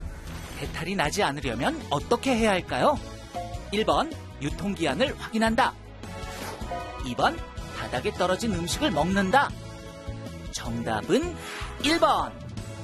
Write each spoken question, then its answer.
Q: 배탈이 나지 않으려면 어떻게 해야 할까요?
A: 정답은 1번.